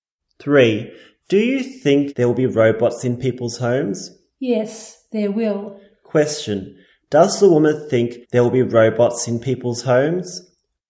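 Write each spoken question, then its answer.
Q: does the woman think there will be robots in people's homes?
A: Yes, she does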